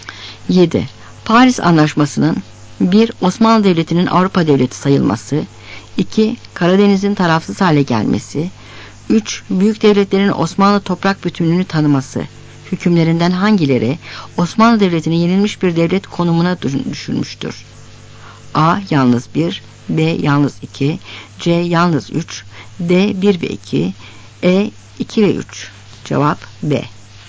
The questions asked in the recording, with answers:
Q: hükümlerinden hangileri Osmanlı Devleti'ni yenilmiş bir devlet konumuna düşürmüştür?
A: Cevap B.